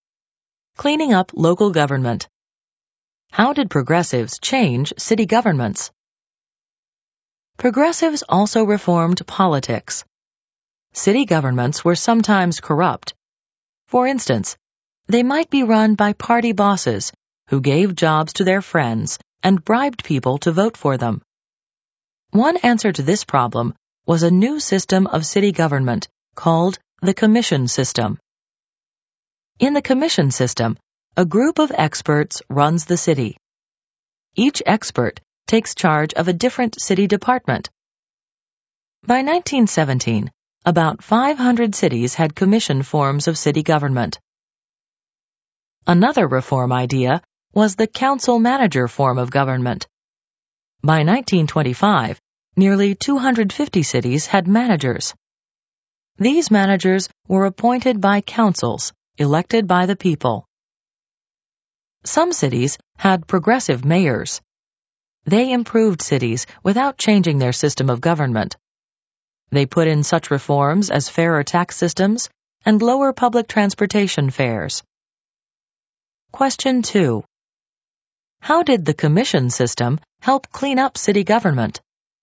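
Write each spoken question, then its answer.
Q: How did the commission system help clean up city government?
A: It put a group of experts in charge of running the city, with each expert heading a different department, instead of corrupt party bosses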